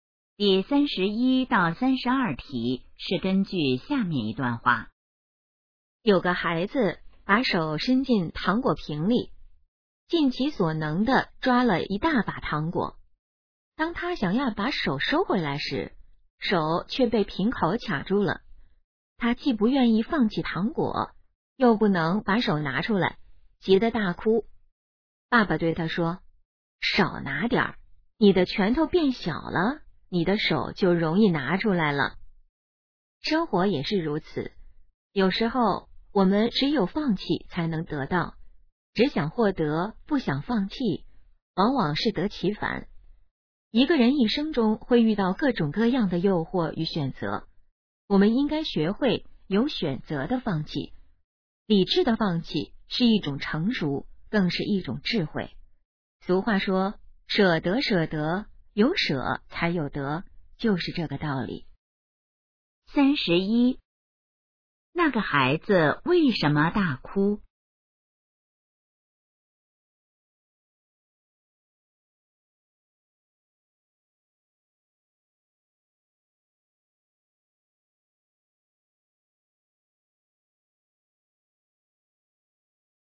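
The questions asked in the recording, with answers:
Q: 那个孩子为什么大哭?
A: 手被瓶口卡住了

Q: 这段话主要想告诉我们什么?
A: 要学会有选择地放弃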